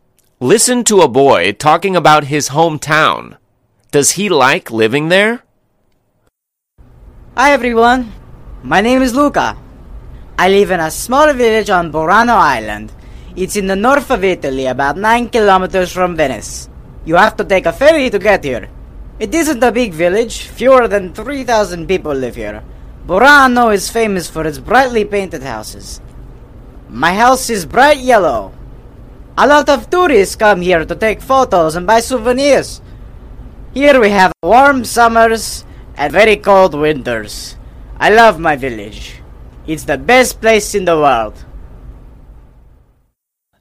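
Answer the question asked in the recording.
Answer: Yes, he loves his village; it's the best place in the world.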